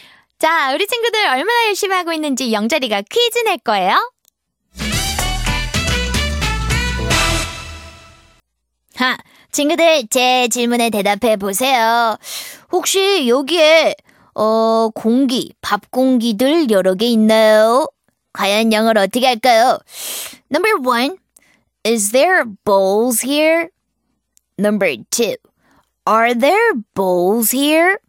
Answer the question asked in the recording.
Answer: 그래서 number two.